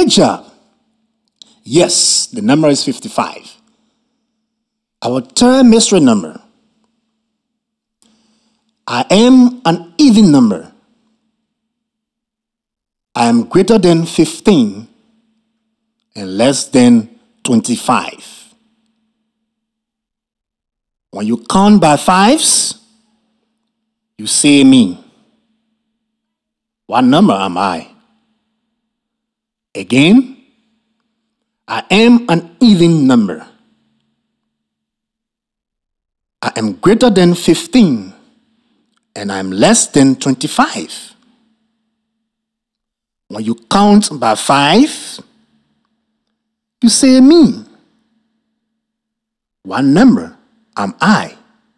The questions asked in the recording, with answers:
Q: What number am I?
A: I know. I am the number 20.